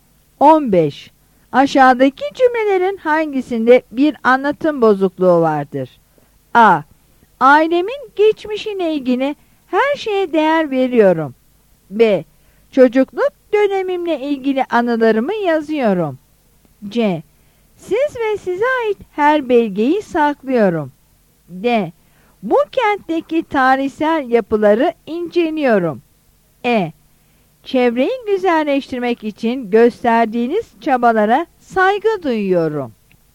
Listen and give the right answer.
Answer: Yanıt C'dir.